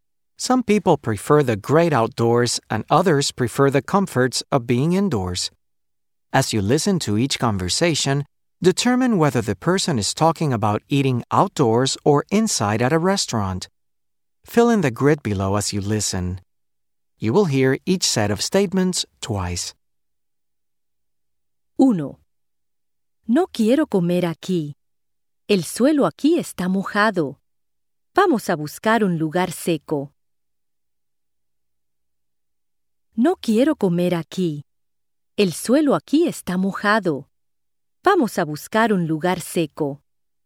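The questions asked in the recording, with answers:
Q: As you listen to each conversation, determine whether the person is talking about eating outdoors or inside at a restaurant.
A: outdoors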